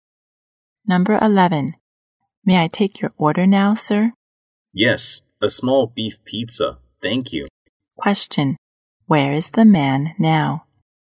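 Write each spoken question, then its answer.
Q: Where is the man now?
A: In a restaurant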